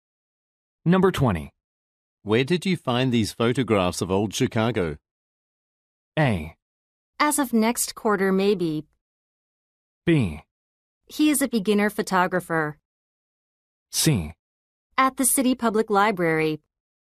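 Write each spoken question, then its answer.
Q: Where did you find these photographs of old Chicago?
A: C: At the City Public Library.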